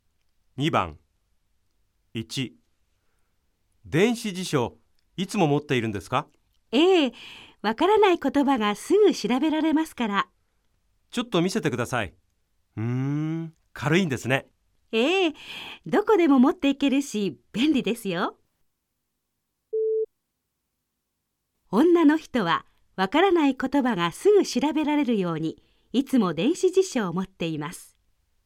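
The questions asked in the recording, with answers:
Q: 女の人はわからない言葉がすぐ調べられるようにいつも電子辞書を持っています。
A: ○(正しい)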